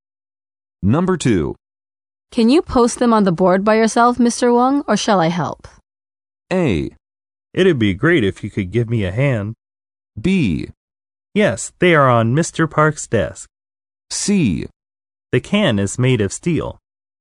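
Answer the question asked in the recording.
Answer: A: It'd be great if you could give me a hand.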